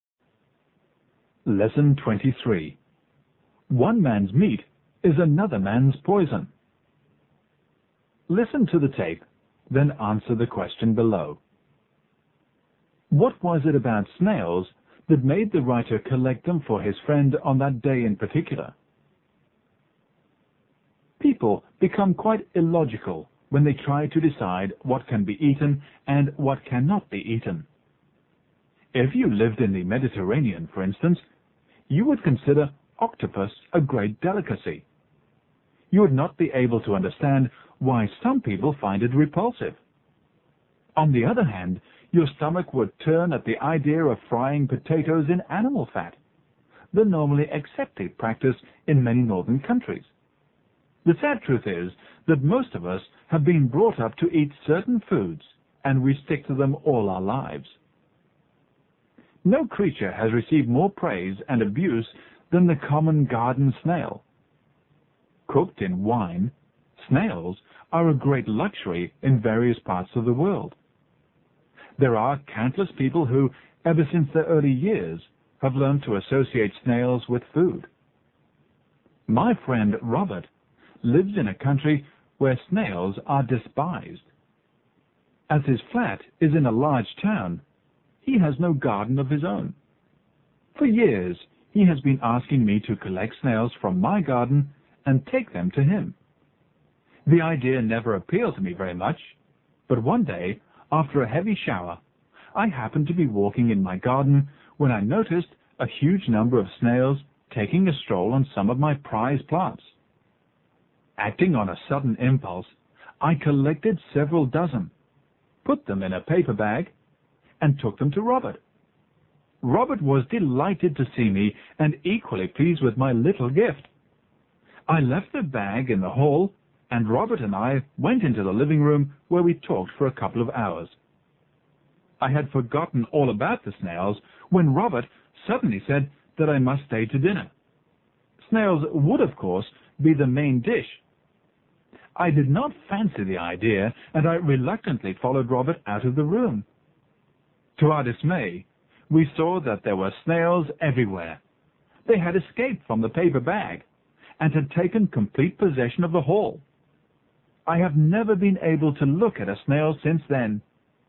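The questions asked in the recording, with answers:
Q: What was it about snails that made the writer collect them for his friend on that day in particular?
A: After a heavy shower, a huge number of snails were crawling over his prize plants in his garden.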